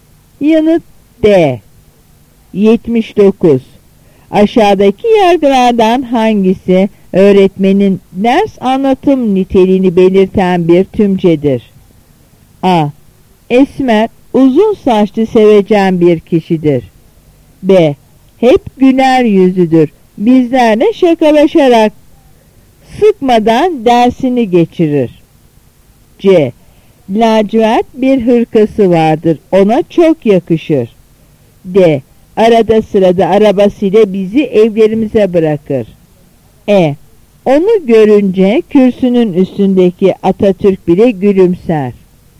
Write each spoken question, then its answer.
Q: Aşağıdaki yargılardan hangisi öğretmenin ders anlatım niteliğini belirten bir tümcedir?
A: Yanıt B.